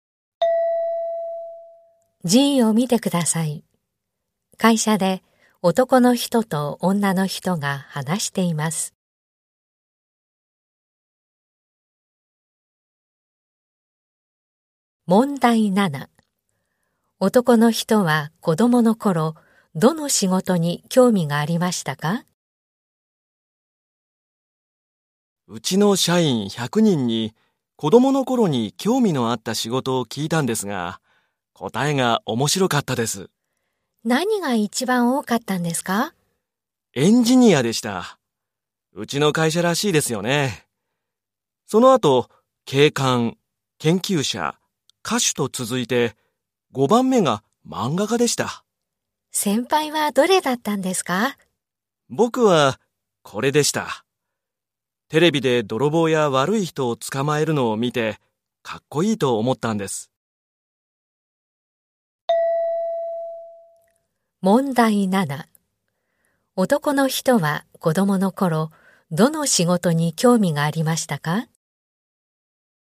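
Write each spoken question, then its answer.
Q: 男の人は子供の頃、どの仕事に興味がありましたか?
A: 警官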